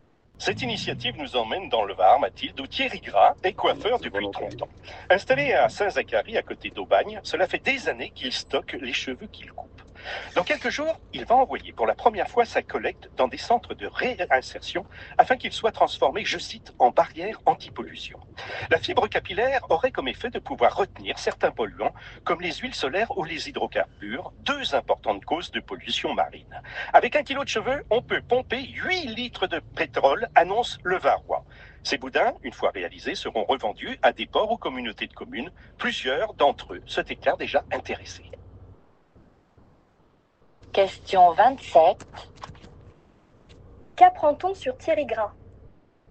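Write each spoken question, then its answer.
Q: Qu'apprend-on sur Thierry Gras?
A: Coiffeur depuis 30 ans, il stocke les cheveux qu'il coupe pour les faire transformer en barrières anti-pollution.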